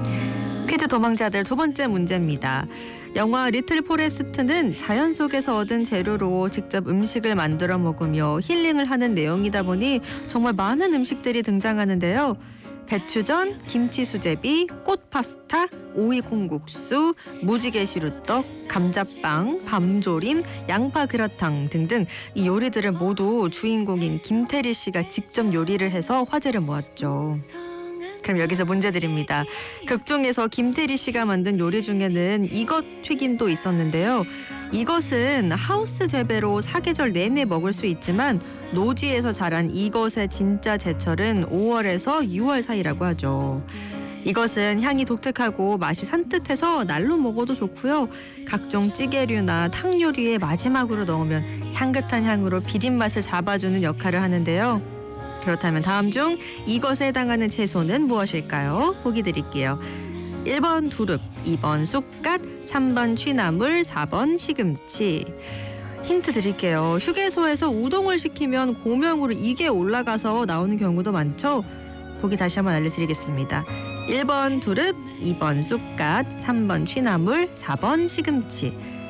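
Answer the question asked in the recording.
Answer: 2: 쑥갓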